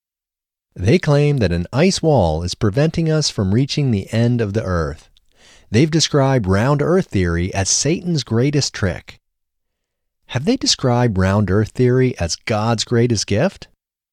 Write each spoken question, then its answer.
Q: Have they described round earth theory as God's greatest gift?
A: No, they haven't described round earth theory as God's greatest gift.